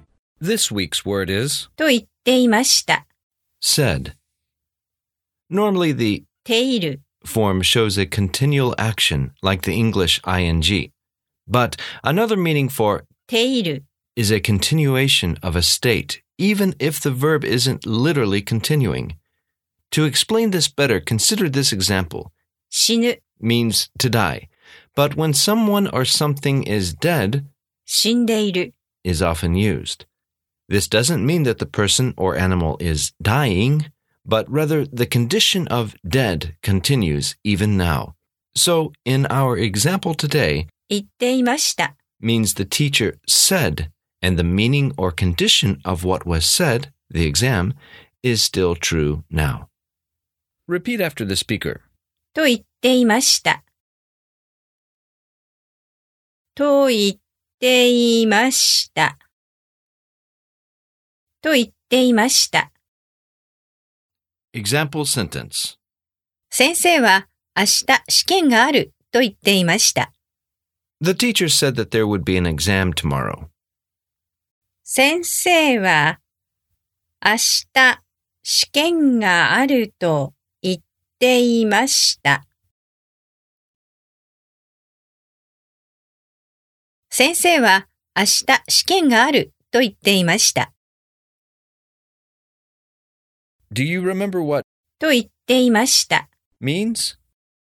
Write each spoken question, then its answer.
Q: Do you remember what? と言っていました。 means?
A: Said.